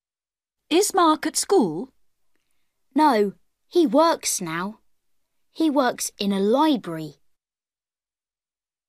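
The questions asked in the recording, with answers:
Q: Is Mark at school?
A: No, he works in a library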